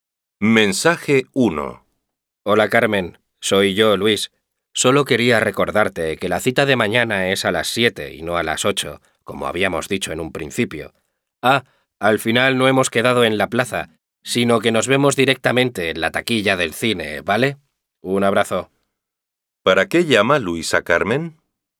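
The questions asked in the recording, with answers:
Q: ¿Para qué llama Luis a Carmen?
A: Para recordarle la hora de la cita y cambiar el lugar de encuentro (la taquilla del cine)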